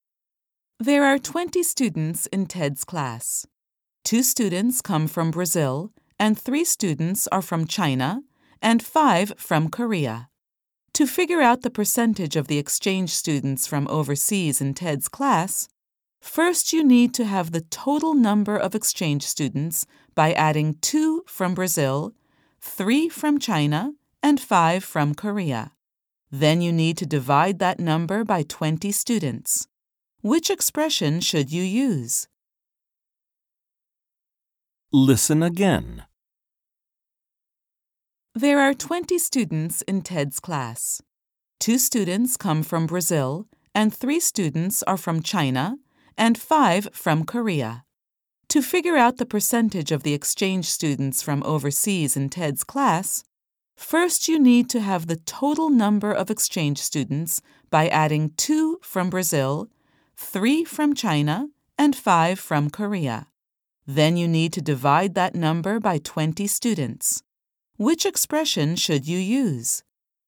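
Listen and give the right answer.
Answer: (2 + 3 + 5) ÷ 20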